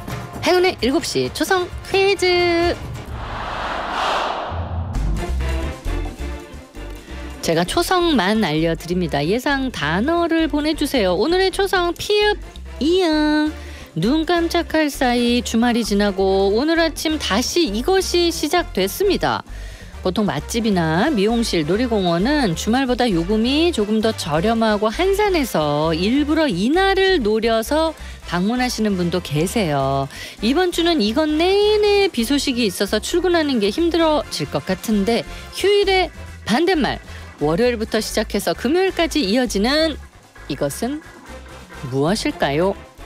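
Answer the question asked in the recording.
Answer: 평일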